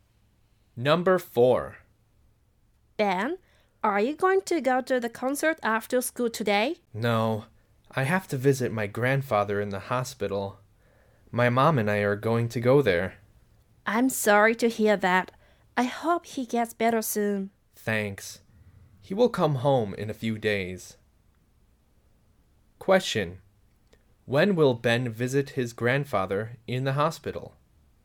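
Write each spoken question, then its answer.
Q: Question: When will Ben visit his grandfather in the hospital?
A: Today after school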